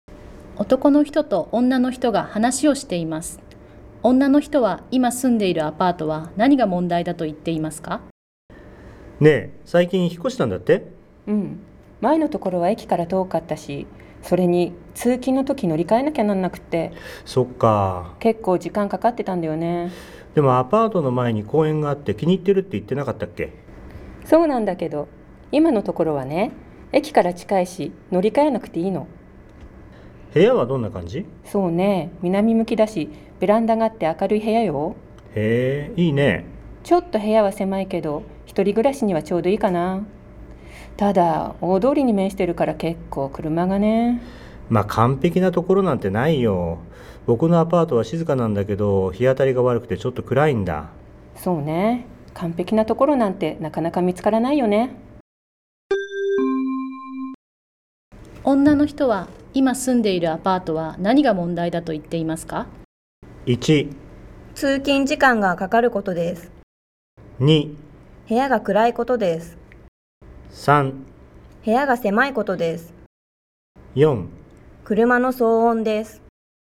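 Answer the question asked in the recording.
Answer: 4: 車の騒音です。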